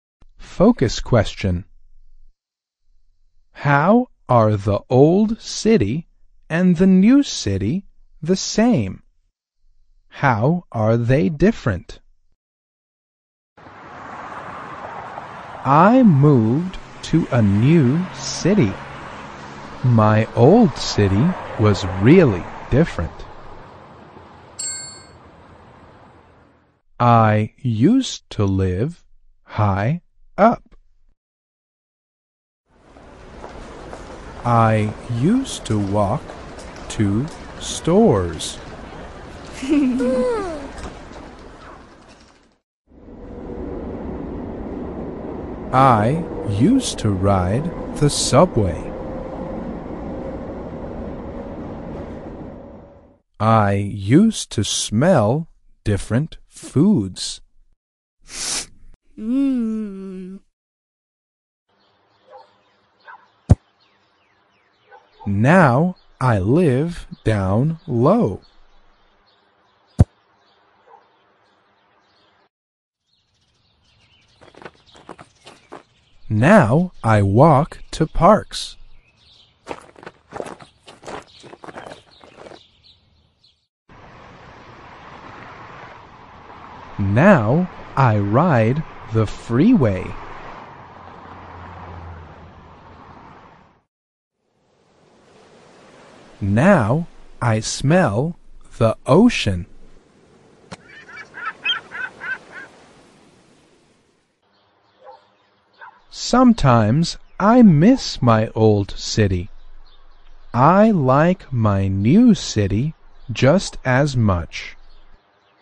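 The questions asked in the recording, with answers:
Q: How are they different?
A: In the old city she lived high up, walked to stores, rode the subway and smelled different foods; in the new city she lives down low, walks to parks, rides the freeway and smells the ocean.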